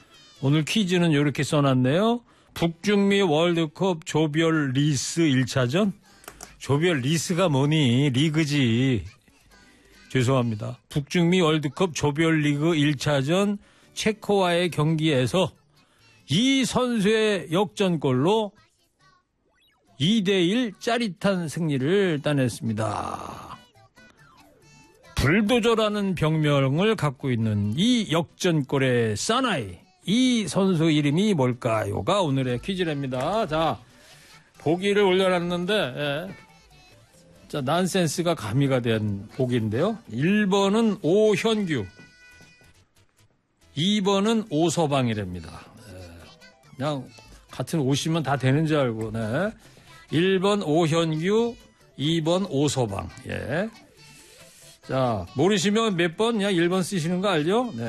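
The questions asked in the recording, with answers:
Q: 불도저라는 병명을 갖고 있는 이 역전골의 사나이, 이 선수 이름이 뭘까요가 오늘의 퀴즈랍니다.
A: 1: 오현규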